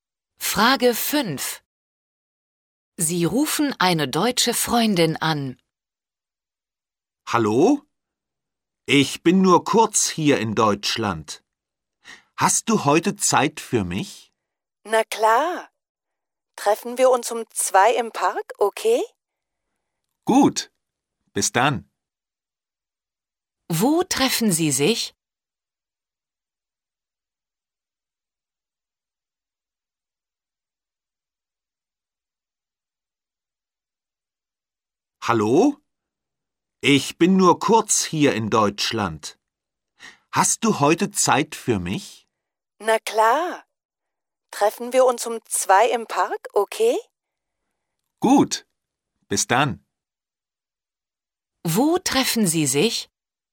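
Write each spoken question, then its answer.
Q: Wo treffen Sie sich?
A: Im Park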